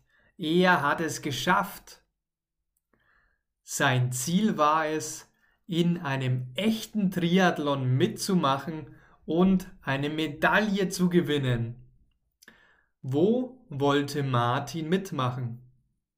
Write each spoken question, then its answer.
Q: Wo wollte Martin mitmachen?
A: In oder bei einem Triathlon.